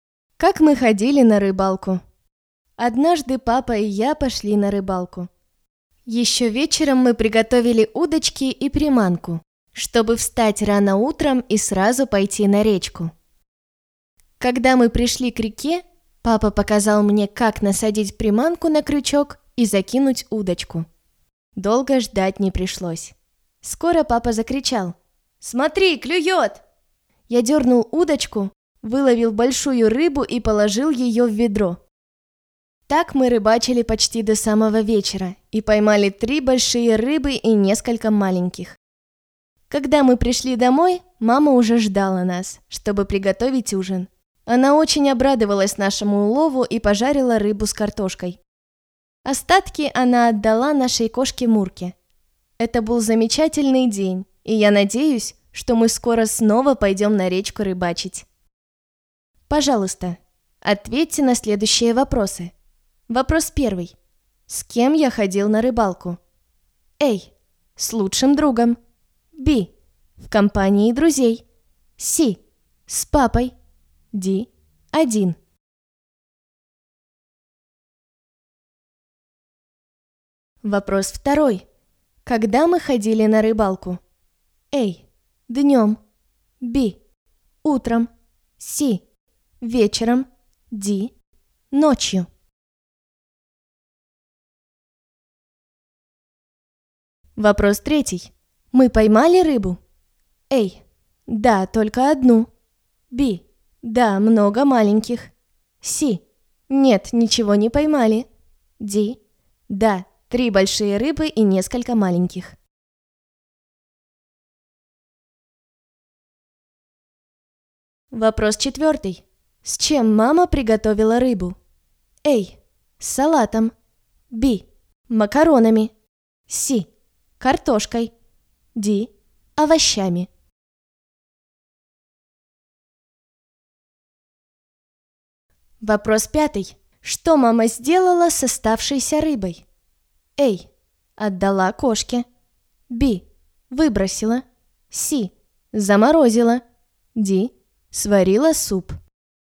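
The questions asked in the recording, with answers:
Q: С кем я ходил на рыбалку?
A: C: С папой.

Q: Когда мы ходили на рыбалку?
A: B: Утром.

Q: Мы поймали рыбу?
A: D: Да, 3 большие рыбы и несколько маленьких.

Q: С чем мама приготовила рыбу?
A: C: Картошкой.

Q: Что мама сделала с оставшейся рыбой?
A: A: Отдала кошке.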